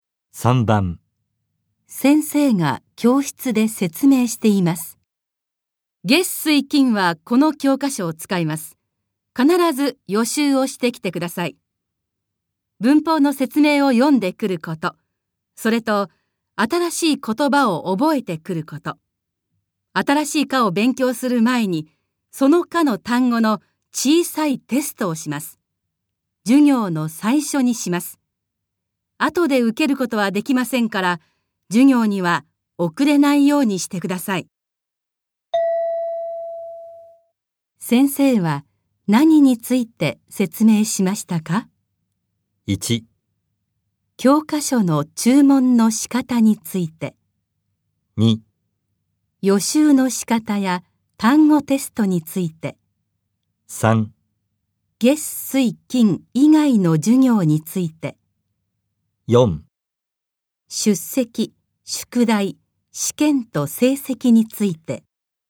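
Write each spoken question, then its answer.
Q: 先生は何について説明しましたか?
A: 2: 予習の仕方や単語テストについて。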